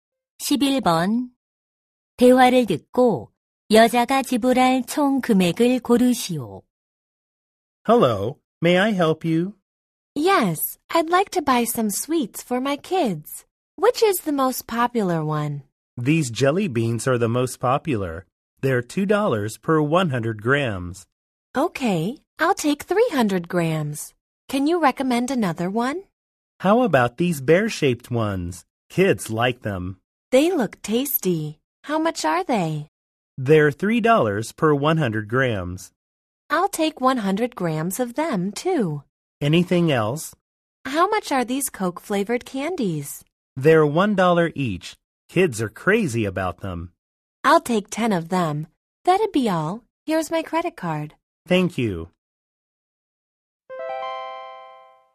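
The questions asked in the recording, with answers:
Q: 대화를 듣고 여자가 지불할 총 금액을 고르시오.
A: $19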